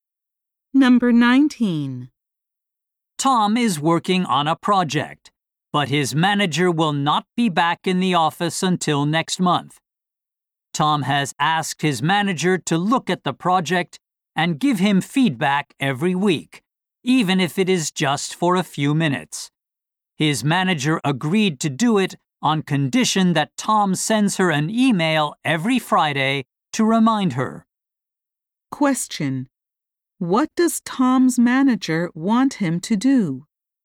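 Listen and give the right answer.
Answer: Send her a reminder email every Friday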